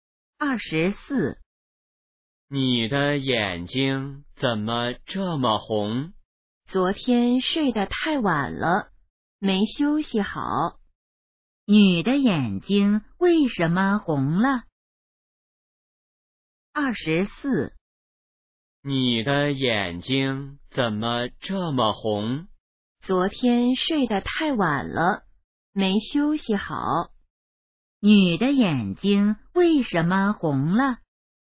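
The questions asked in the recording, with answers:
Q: 女的眼睛为什么红了?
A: 昨天睡得太晚了,没休息好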